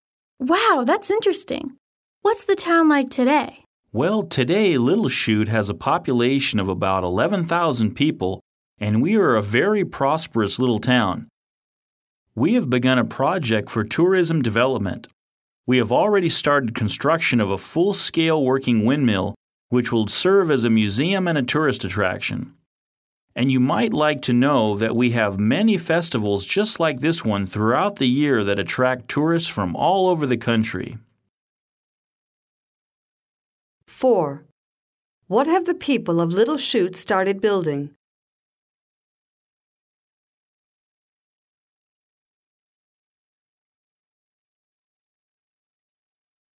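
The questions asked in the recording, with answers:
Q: What have the people of Little Chute started building?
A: A full-scale working windmill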